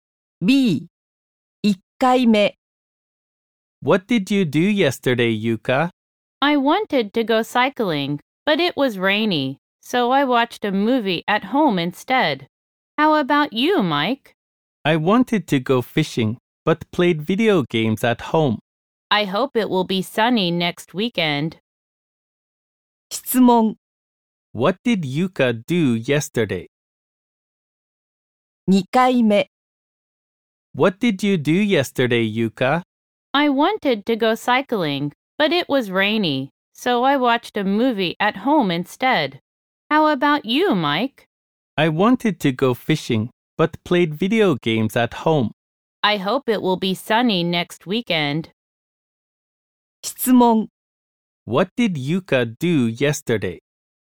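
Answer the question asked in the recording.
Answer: She watched a movie at home.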